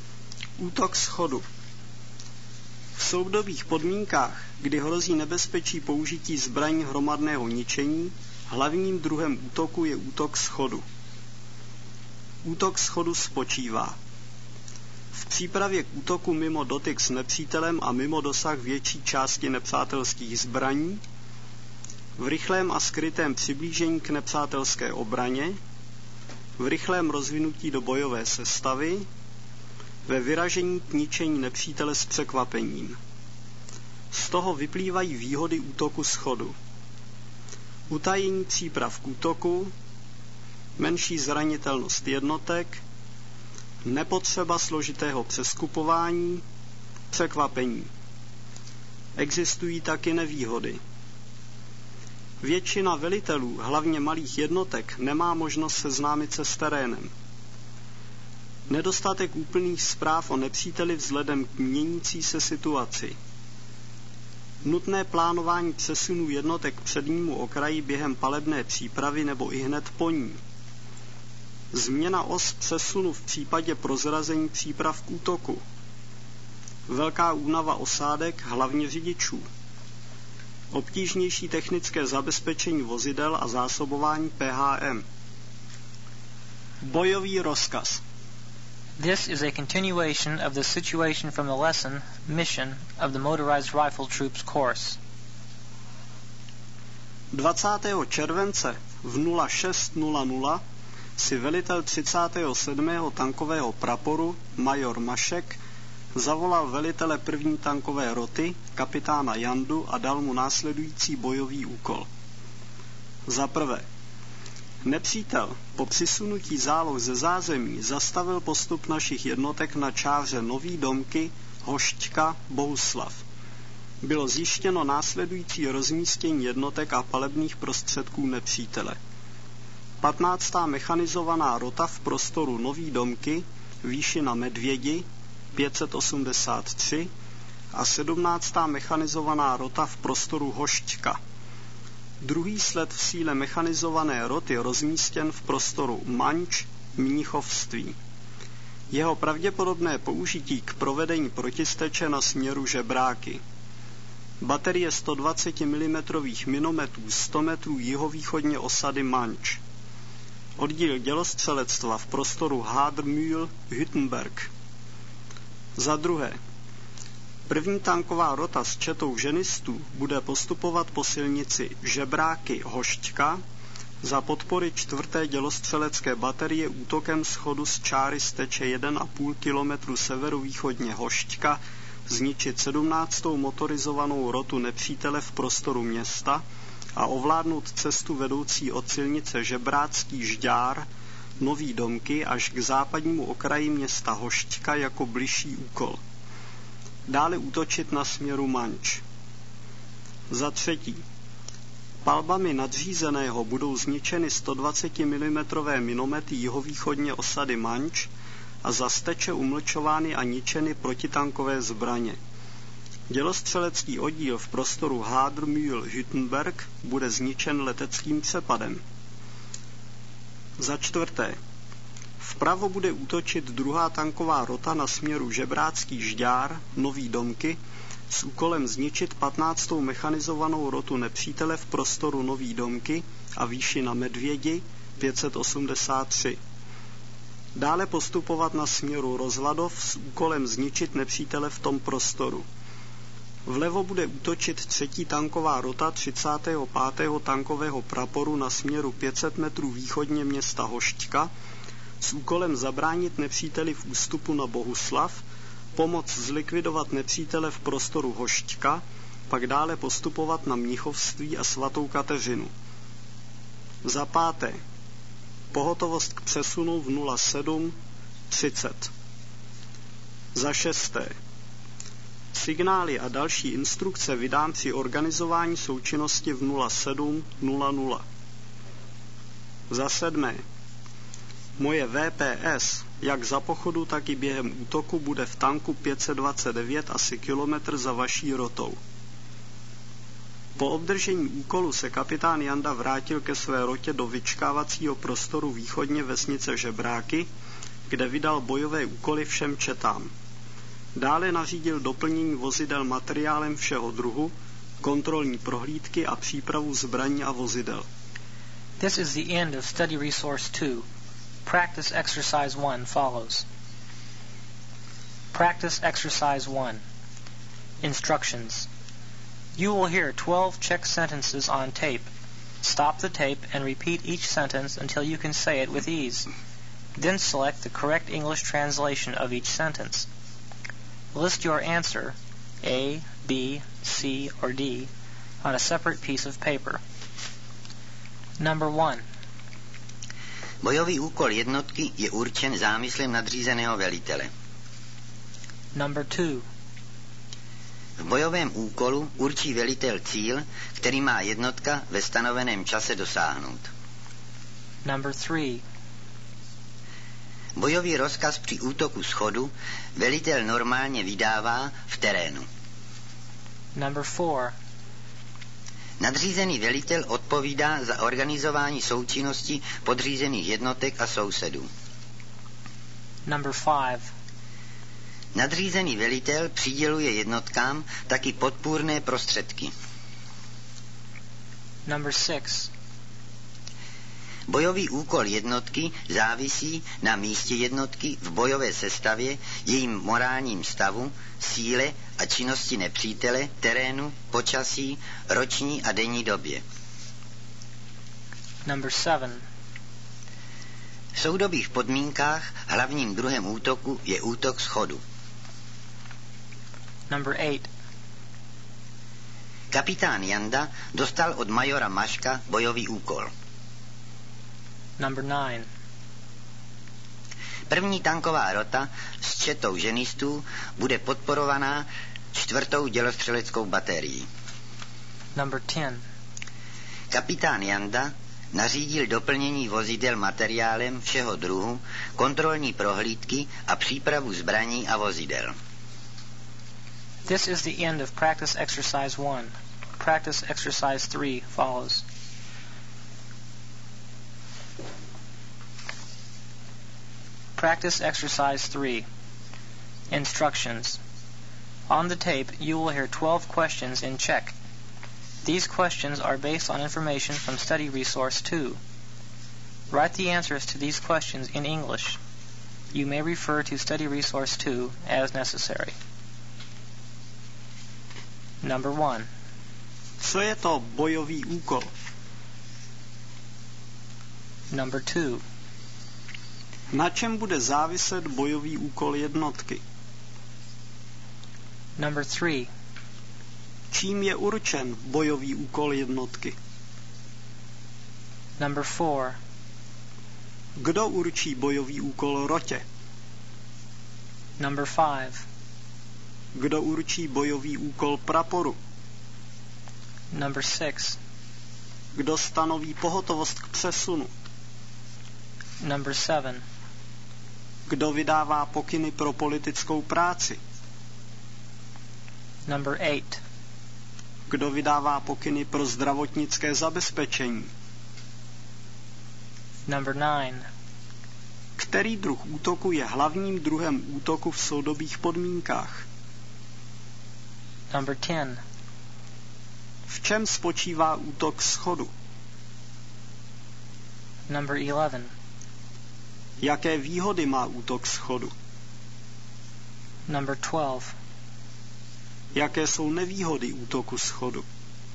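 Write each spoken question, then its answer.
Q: Který druh útoku je hlavním druhem útoku v soudobých podmínkách?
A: útok schodu

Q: V čem spočívá útok schodu?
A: v přípravě k útoku mimo dotyk s nepřítelem a mimo dosah jeho zbraní, rychlém a skrytém přiblížení, rychlém rozvinutí do bojové sestavy a vyražení k ničení nepřítele s překvapením

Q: Jaké výhody má útok schodu?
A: utajení příprav k útoku, menší zranitelnost jednotek, nepotřeba složitého přeskupování, překvapení

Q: Jaké jsou nevýhody útoku schodu?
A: velitelé se nemohou seznámit s terénem, nedostatek zpráv o nepříteli, nutné plánování přesunů během palebné přípravy, změna os přesunu při prozrazení, velká únava osádek, obtížnější technické zabezpečení a zásobování PHM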